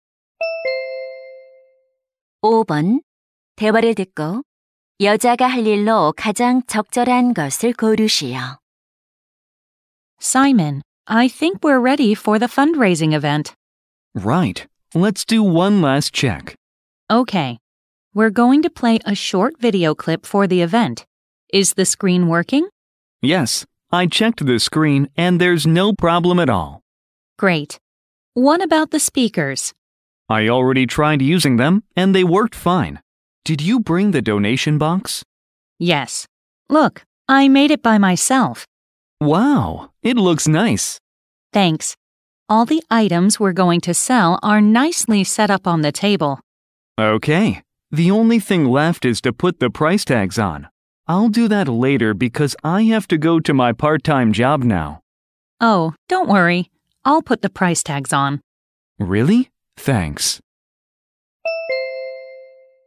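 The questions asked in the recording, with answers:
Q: 대화를 듣고 여자가 할 일로 가장 적절한 것을 고르시오.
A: 가격표 붙이기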